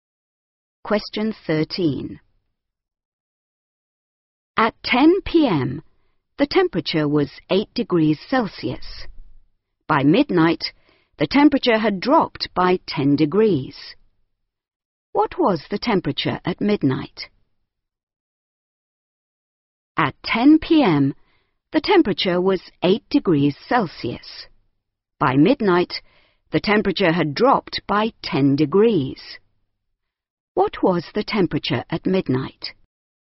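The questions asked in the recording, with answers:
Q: What was the temperature at midnight?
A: -2 degrees Celsius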